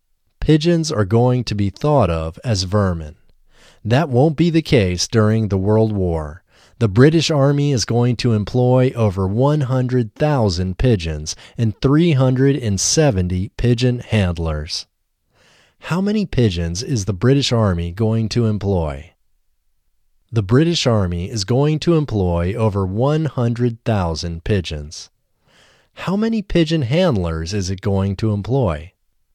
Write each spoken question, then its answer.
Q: How many pigeons is the British Army going to employ?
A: The British Army is going to employ over 100,000 pigeons.

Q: How many pigeon handlers is it going to employ?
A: It is going to employ 370 pigeon handlers.